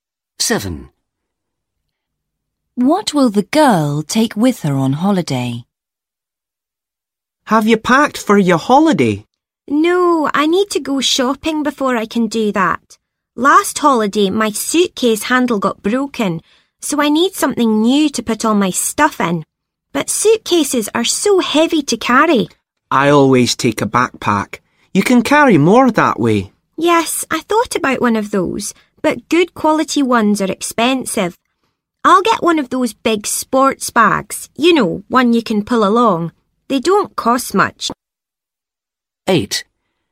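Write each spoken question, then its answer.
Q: What will the girl take with her on holiday?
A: A big sports bag you can pull along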